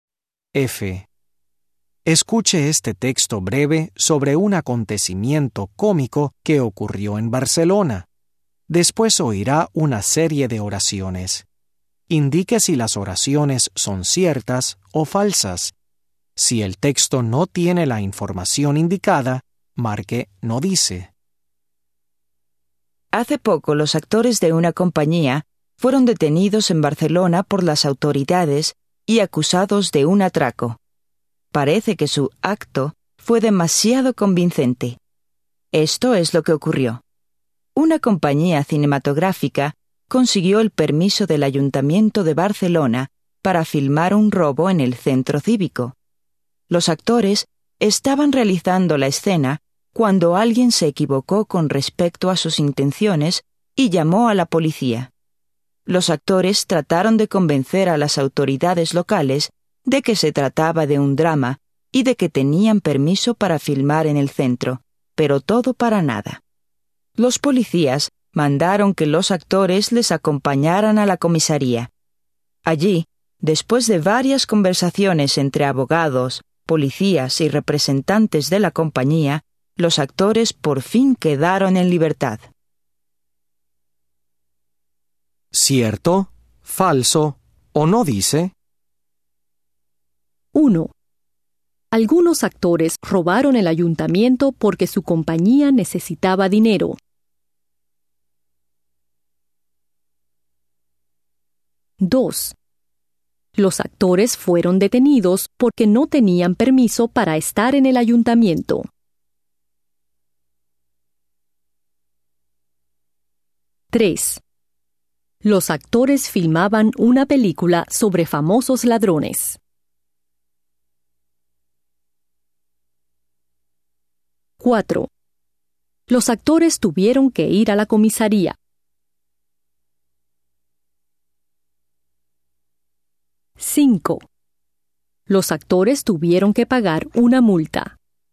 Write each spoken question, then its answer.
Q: Algunos actores robaron el ayuntamiento porque su compañía necesitaba dinero.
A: Falso.

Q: Los actores fueron detenidos porque no tenían permiso para estar en el ayuntamiento.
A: Falso.

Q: Los actores filmaban una película sobre famosos ladrones.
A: No dice.

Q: Los actores tuvieron que ir a la comisaría.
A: Cierto.

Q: Los actores tuvieron que pagar una multa.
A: No dice.